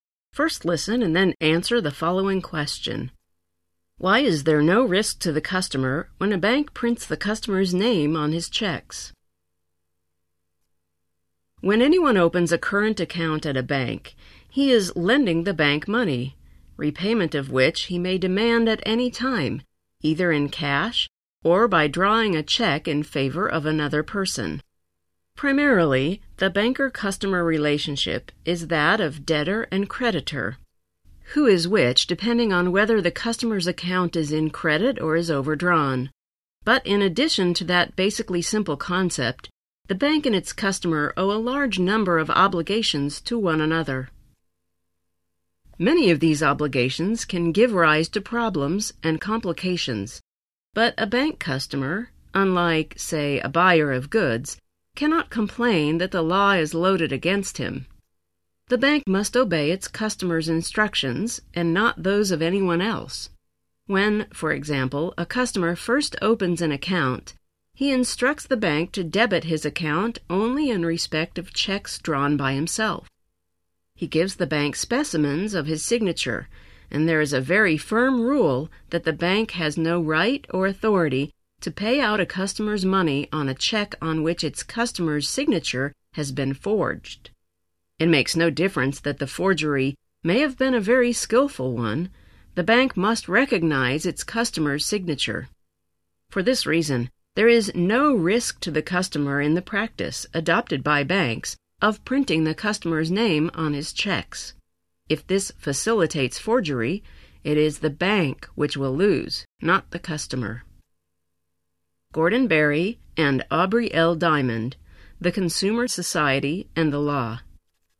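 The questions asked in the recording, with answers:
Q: Why is there no risk to the customer when a bank prints the customer's name on his checks?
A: Because the bank must recognize its customer's signature and, if forgery happens, the bank loses, not the customer.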